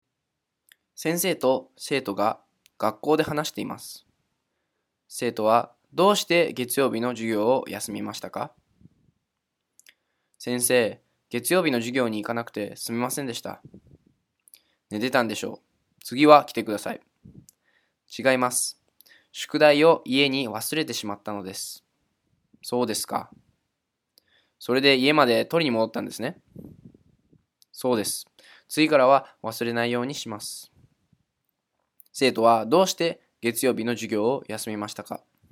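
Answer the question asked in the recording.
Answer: 宿題を家に忘れて、取りに戻ったから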